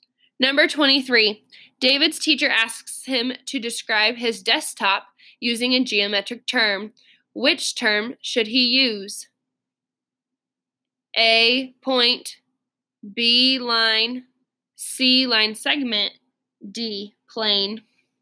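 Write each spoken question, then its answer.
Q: Which term should he use?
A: D: plane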